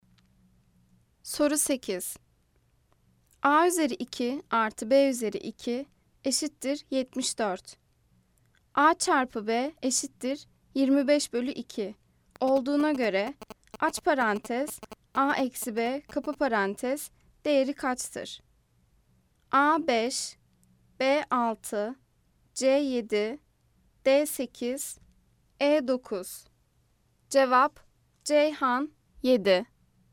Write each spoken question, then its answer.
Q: A çarpı B eşittir 25 bölü 2 olduğuna göre aç parantez A eksi B kapı parantez değeri kaçtır?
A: Cevap Ceyhan 7.